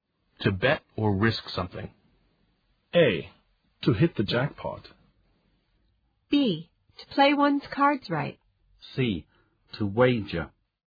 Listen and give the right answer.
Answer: The answer is C, to wager.